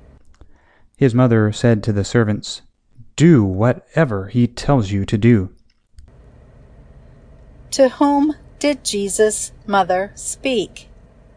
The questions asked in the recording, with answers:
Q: To whom did Jesus' mother speak?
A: Jesus' mother spoke to the servants.